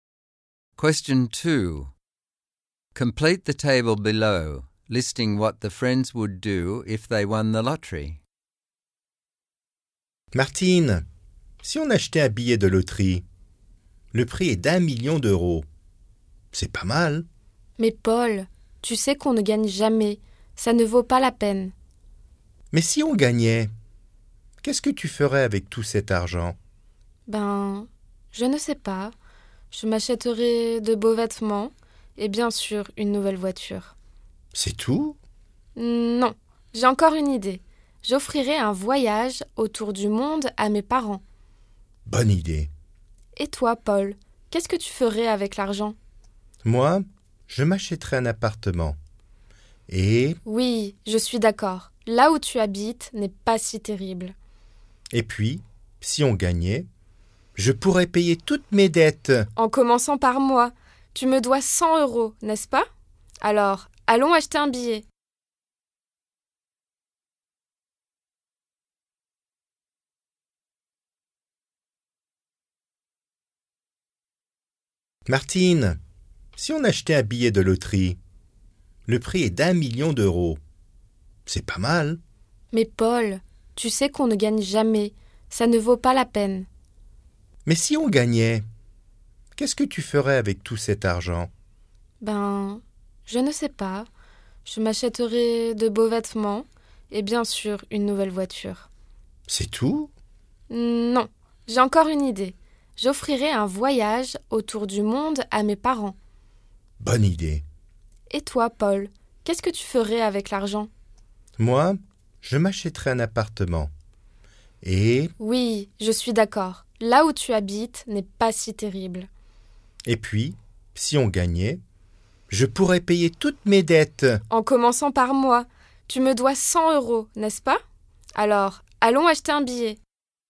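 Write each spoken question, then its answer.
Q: Complete the table below, listing what the friends would do if they won the lottery.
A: Martine: buy nice clothes and a new car, give her parents a trip around the world; Paul: buy an apartment and pay off all his debts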